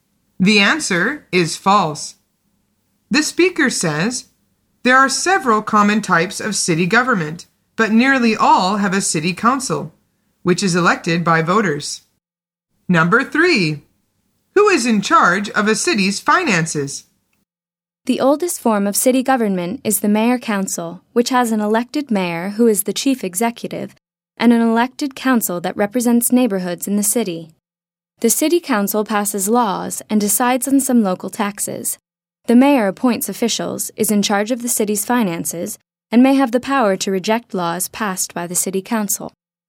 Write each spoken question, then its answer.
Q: Who is in charge of a city's finances?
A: The answer is the mayor.